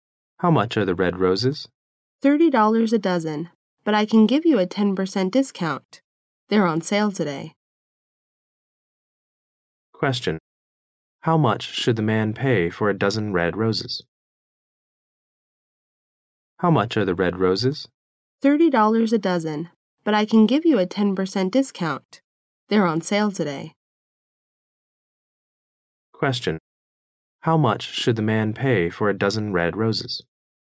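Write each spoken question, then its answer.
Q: How much should the man pay for a dozen red roses?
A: $27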